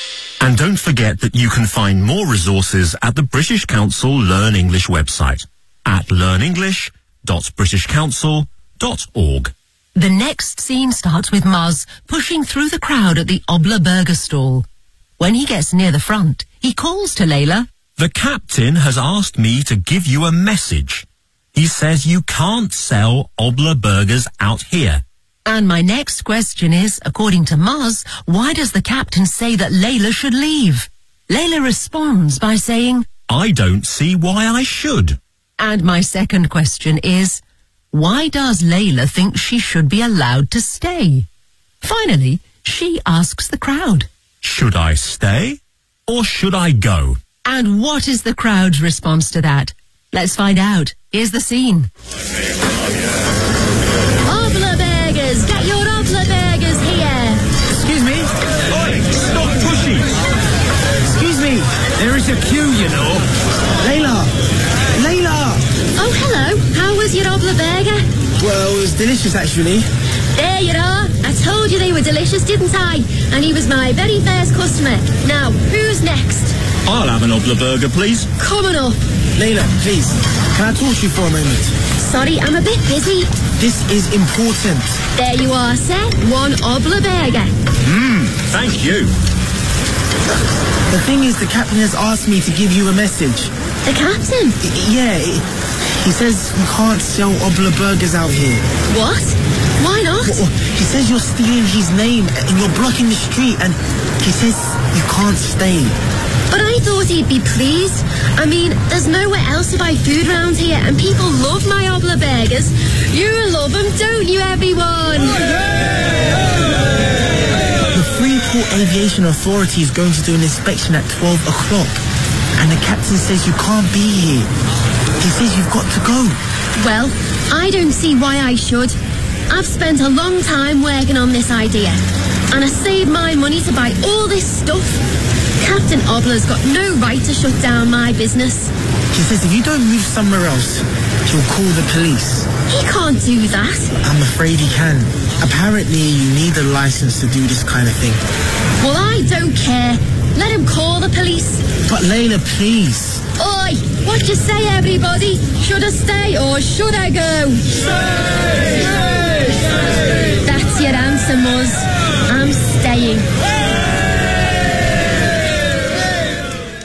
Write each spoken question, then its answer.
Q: according to Muzz, why does the captain say that Layla should leave?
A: you're stealing his name and you're blocking the street.

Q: why does Layla think she should be allowed to stay?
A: I've spent a long time working on this idea, and I saved my money to buy all this stuff.

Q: And what is the crowd's response to that?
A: Of course, they all tell her to stay.